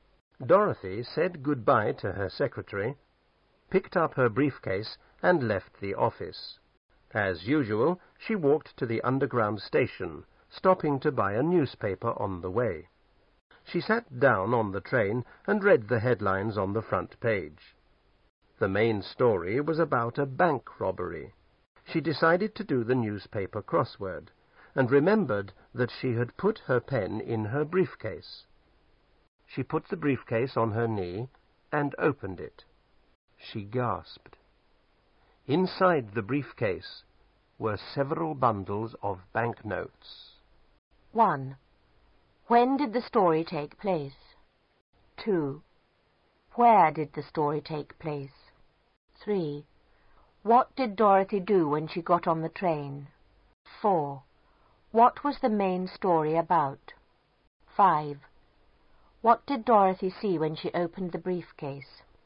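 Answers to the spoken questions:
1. After work, when Dorothy left the office
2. On the underground train
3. She sat down and read the newspaper headlines
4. A bank robbery
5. Several bundles of banknotes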